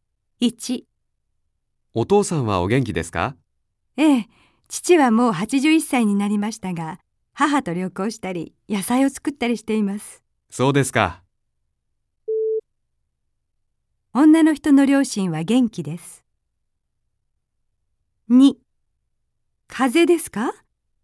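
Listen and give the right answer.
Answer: ○(正しい)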